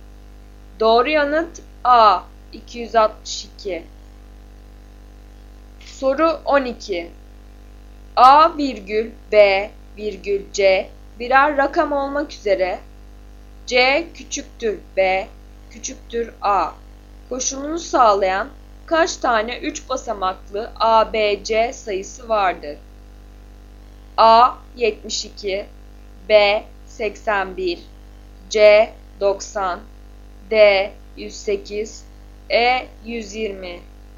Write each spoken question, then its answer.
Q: A virgül B virgül C birer rakam olmak üzere C küçüktür B küçüktür A koşulunu sağlayan kaç tane 3 basamaklı ABC sayısı vardır?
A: Doğru yanıt E 120.